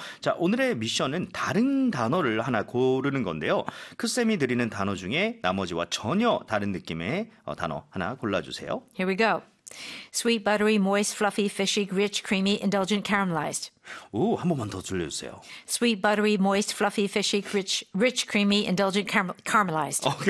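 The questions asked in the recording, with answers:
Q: 크쌤이 드리는 단어 중에 나머지와 전혀 다른 느낌의 단어 하나 골라주세요.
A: fishy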